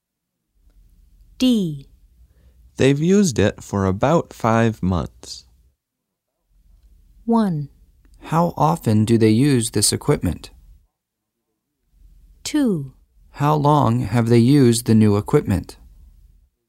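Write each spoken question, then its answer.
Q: They've used it for about 5 months.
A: 2: How long have they used the new equipment?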